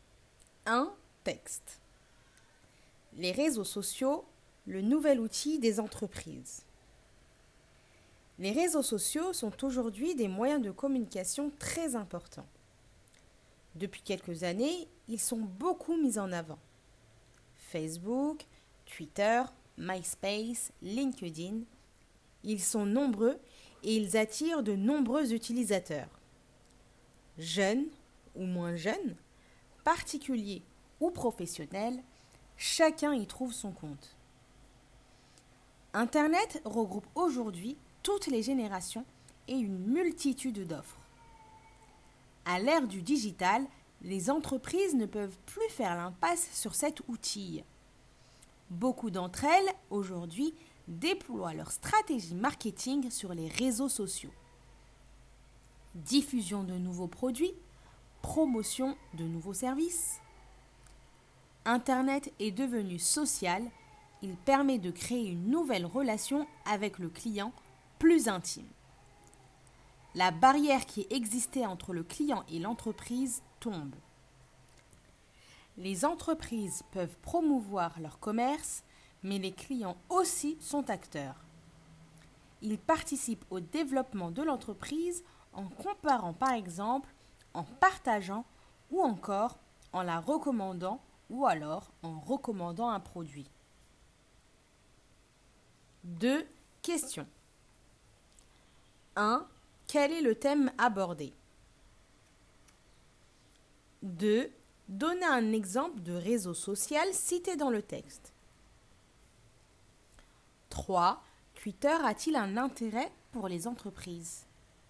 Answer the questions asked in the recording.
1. Le texte aborde l'utilisation des réseaux sociaux dans les entreprises.
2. Facebook, Twitter.
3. Oui.